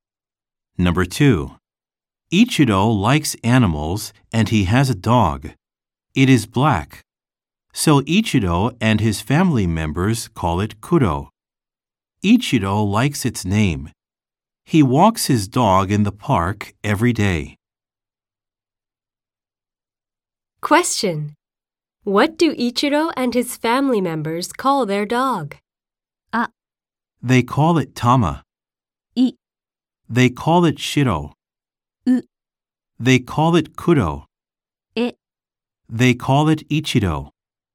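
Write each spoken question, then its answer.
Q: What do Ichiro and his family members call their dog?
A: U: They call it Kuro.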